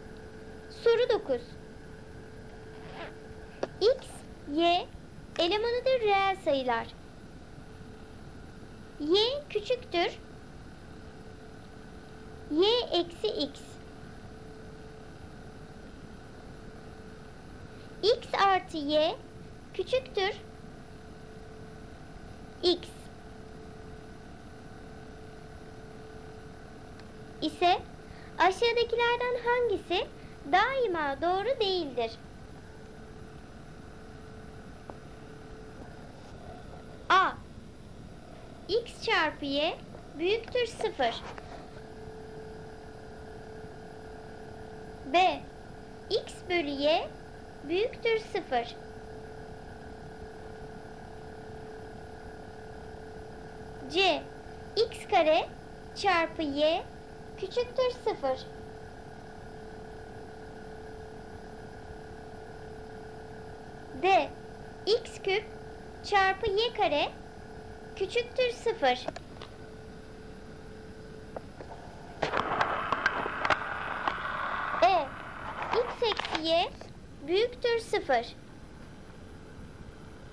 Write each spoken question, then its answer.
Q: İse aşağıdakilerden hangisi daima doğru değildir?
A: Doğru cevap E. X eksi Y büyüktür 0.